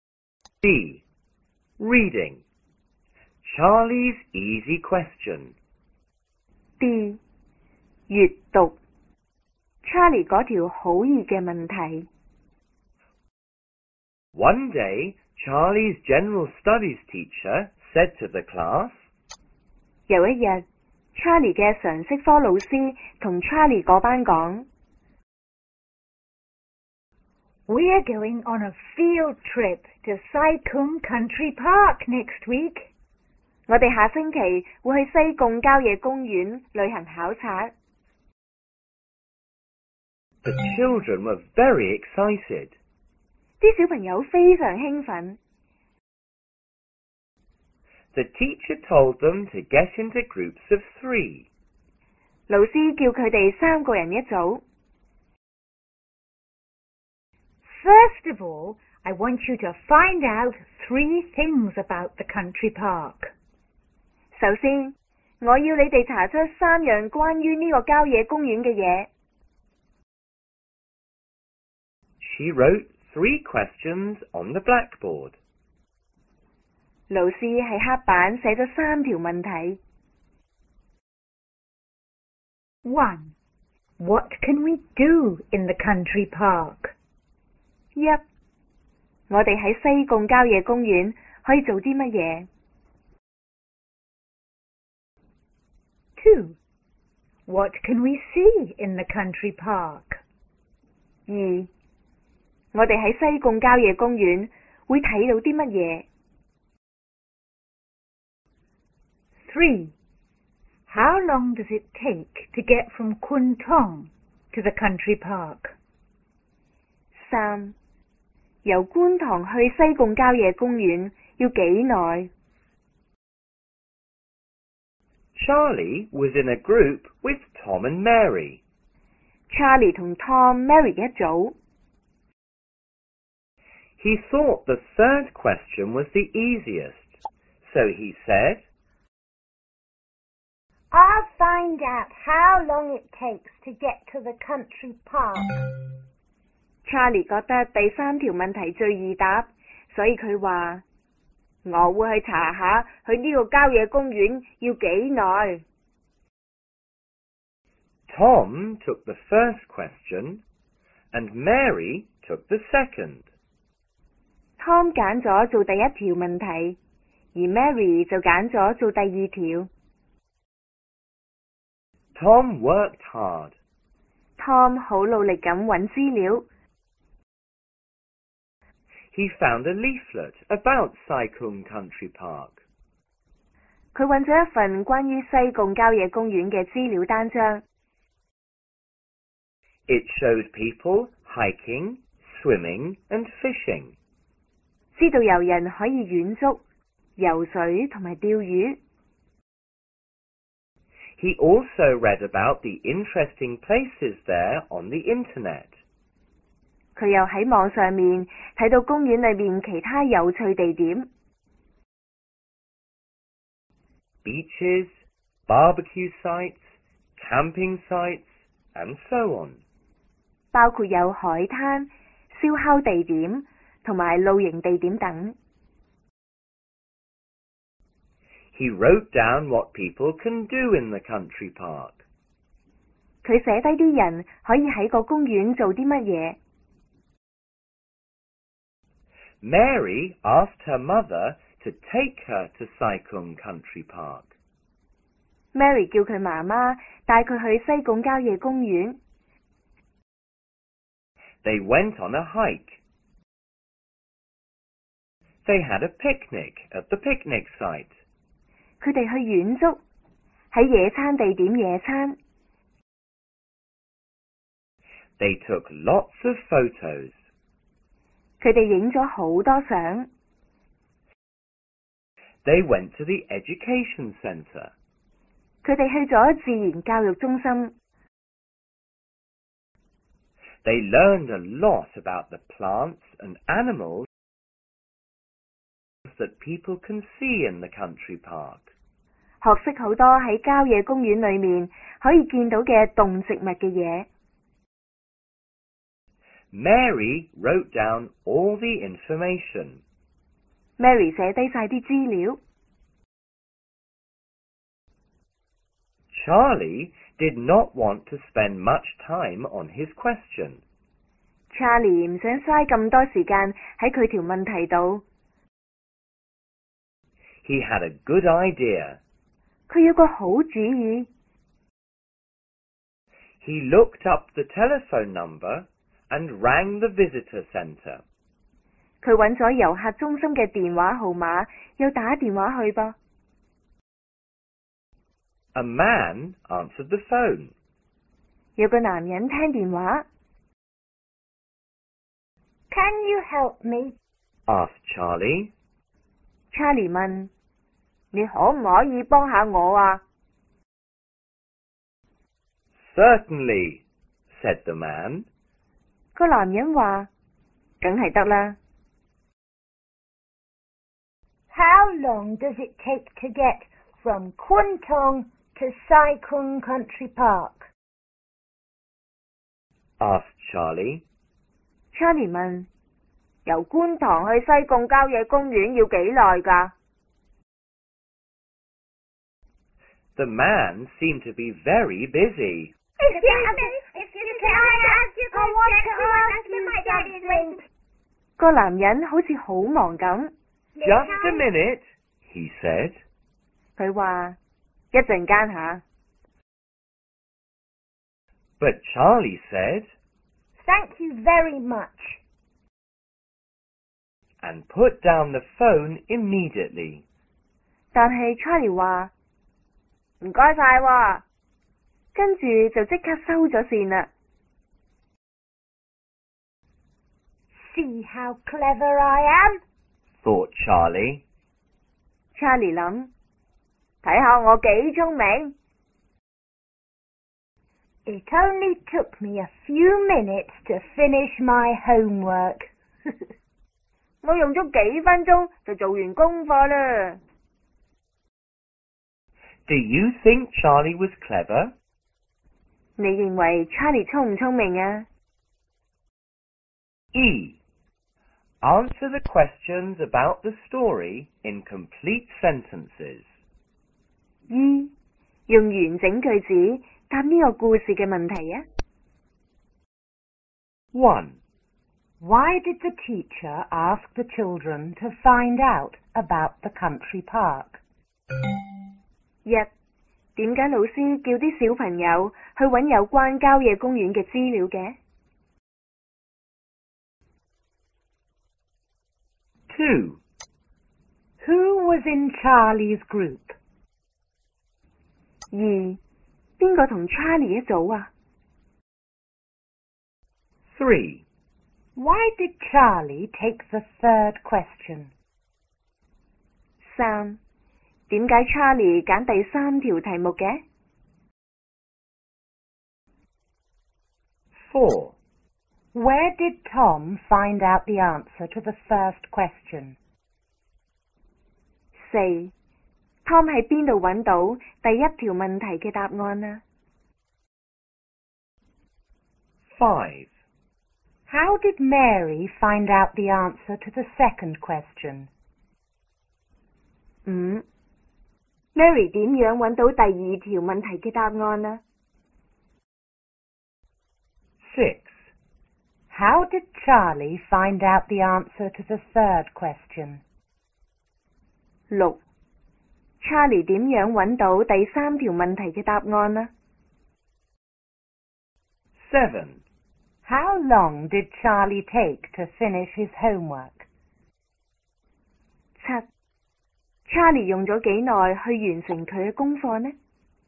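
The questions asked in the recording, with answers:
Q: Why did the teacher ask the children to find out about the country park?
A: Because they were going on a field trip to Sai Kung Country Park the next week.

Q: Who was in Charlie's group?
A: Tom and Mary

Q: Why did Charlie take the third question?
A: He thought it was the easiest.

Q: Where did Tom find out the answer to the first question?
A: In a leaflet about the park and on the internet

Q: How did Mary find out the answer to the second question?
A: Her mother took her to the country park, and at the education center she learned about the plants and animals.

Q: How long did Charlie take to finish his homework?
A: A few minutes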